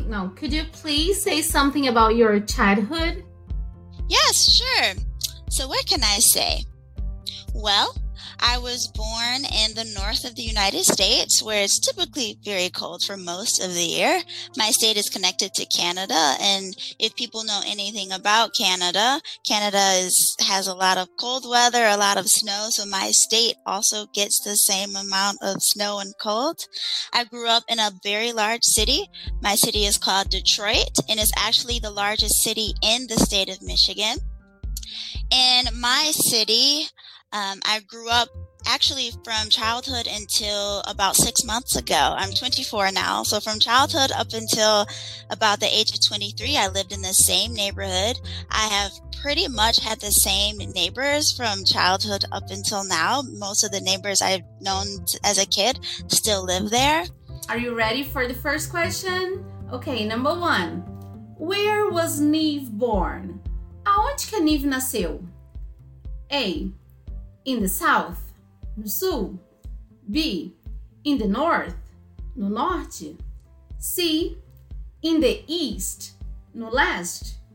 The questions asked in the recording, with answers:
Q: Where was Neve born?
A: so the right answer is letter B, in the north of the United States.